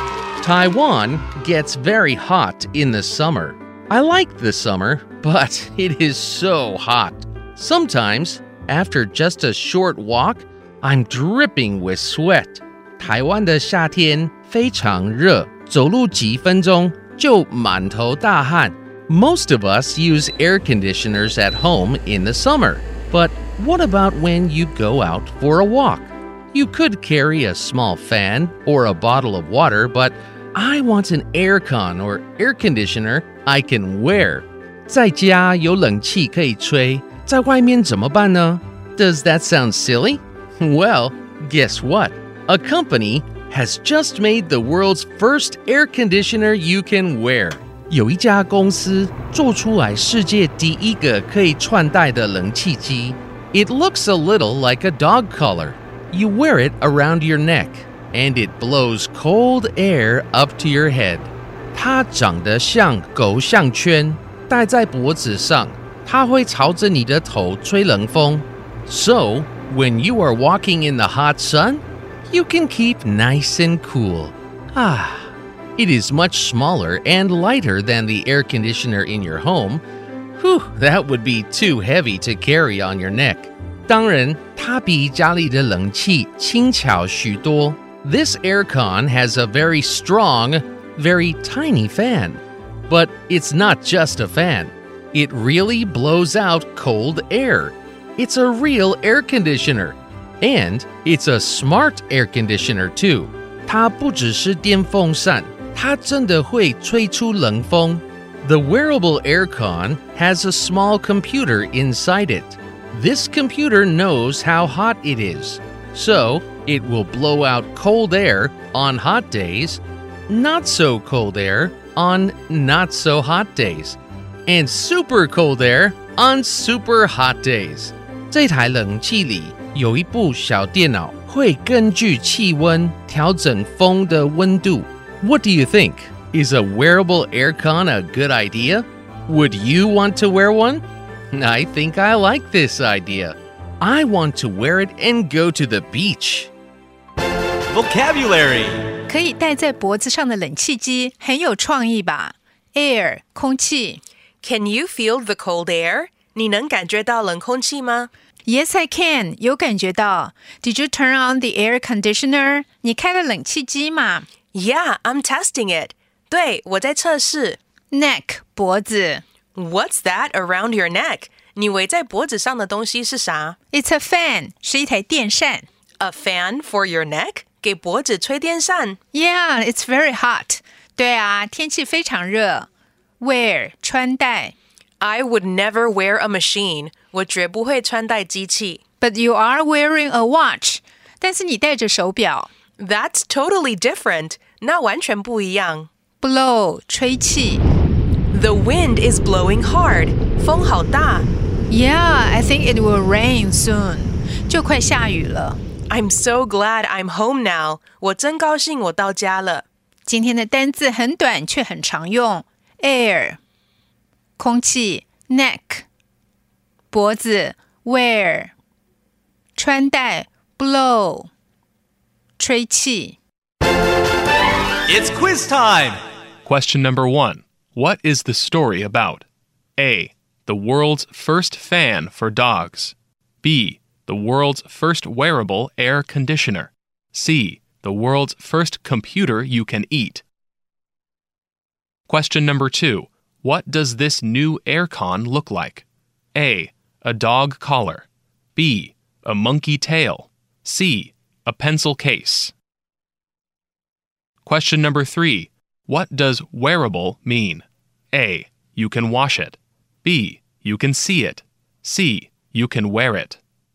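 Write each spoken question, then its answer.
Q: What is the story about?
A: B: The world's first wearable air conditioner.

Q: What does this new aircon look like?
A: A: A dog collar.

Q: What does wearable mean?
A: C: You can wear it.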